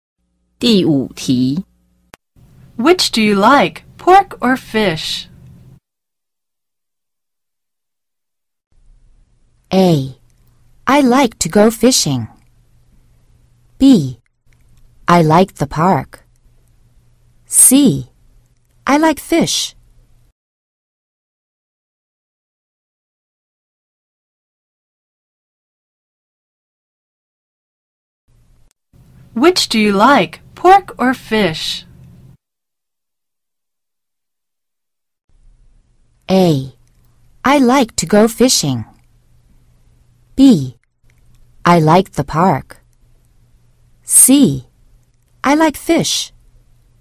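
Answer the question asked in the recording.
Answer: C: I like fish.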